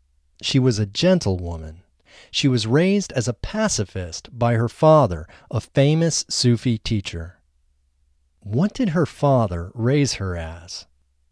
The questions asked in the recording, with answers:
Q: What did her father raise her as?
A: Her father raised her as a pacifist.